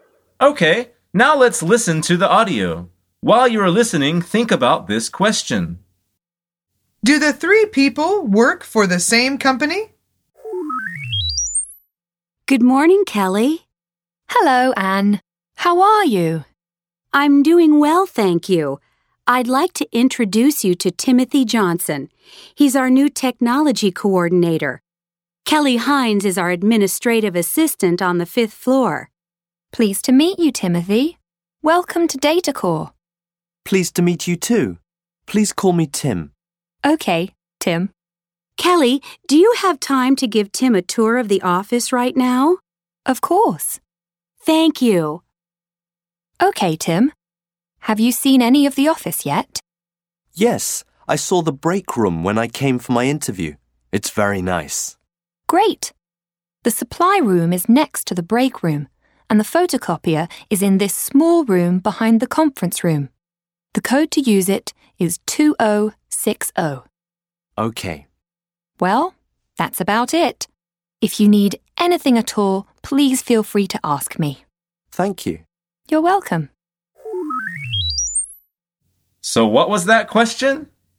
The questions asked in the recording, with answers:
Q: Do the three people work for the same company?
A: The answer is yes. They all work at DataCore.